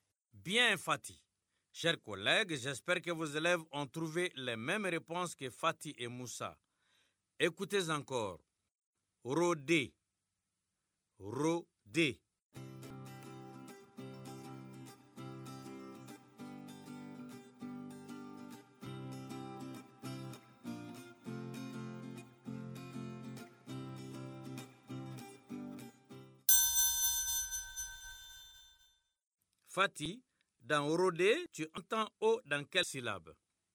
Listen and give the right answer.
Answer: Monsieur, dans Ro, la première syllabe.